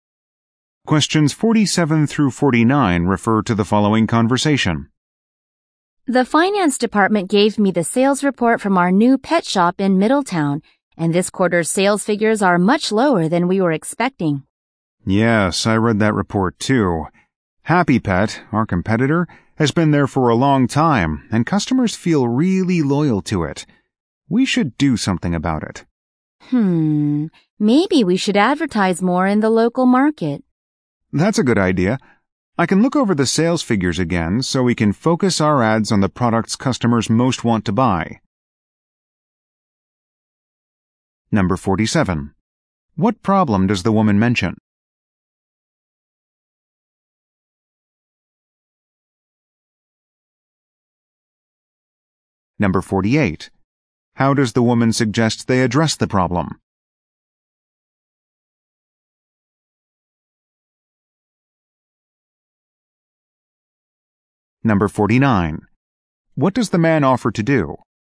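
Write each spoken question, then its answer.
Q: What problem does the woman mention?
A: The new pet shop's sales are lower than expected

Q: How does the woman suggest they address the problem?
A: Advertise more in the local market

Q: What does the man offer to do?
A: Look over the sales figures again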